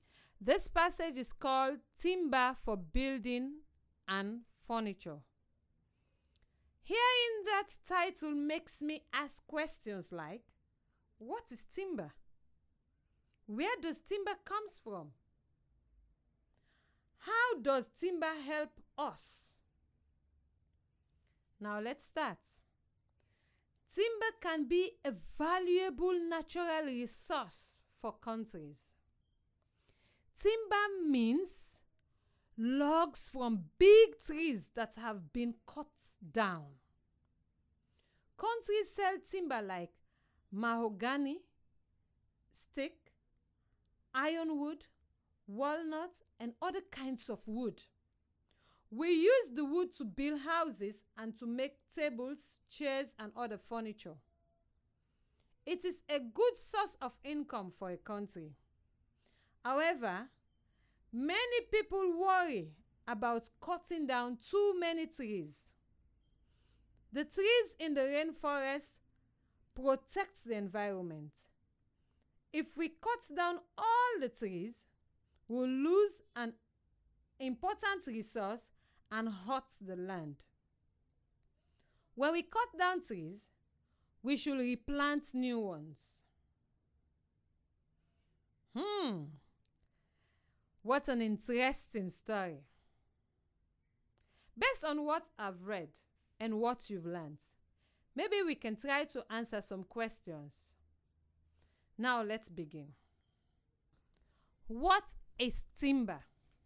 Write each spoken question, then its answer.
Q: What is timber?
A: In the passage, timber means log from big trees that have been cut down.